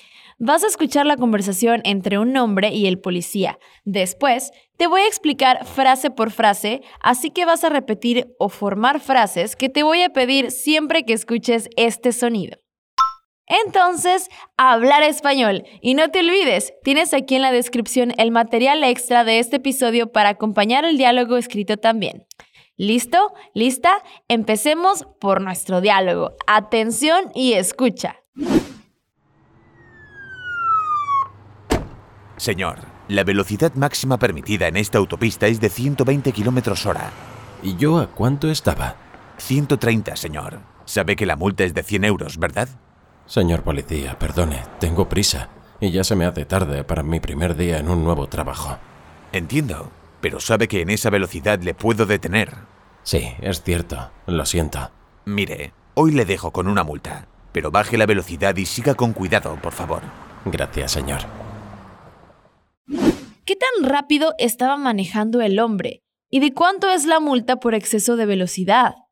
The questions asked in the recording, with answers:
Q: ¿Qué tan rápido estaba manejando el hombre?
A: 130, señor.

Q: ¿Y de cuánto es la multa por exceso de velocidad?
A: 100 euros.